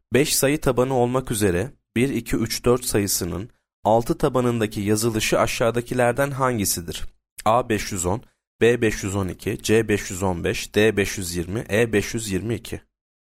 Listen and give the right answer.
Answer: Yanıt E 522.